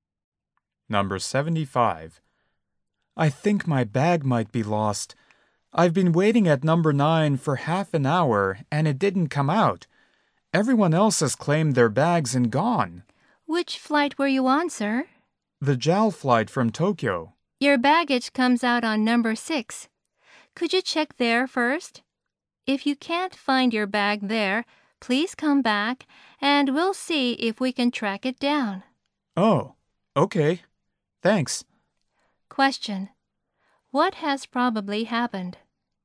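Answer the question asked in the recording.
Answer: He waited at the wrong baggage carousel (9 instead of 6)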